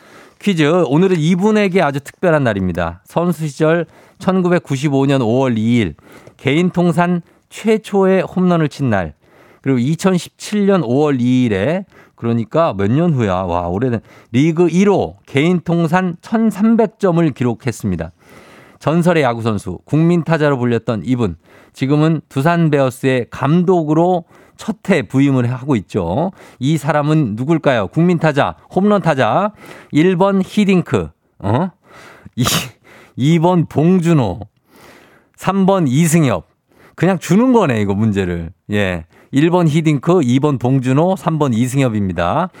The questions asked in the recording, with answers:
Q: 이 사람은 누굴까요? 국민 타자, 홈런 타자.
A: 정답은 바로 이승엽이죠.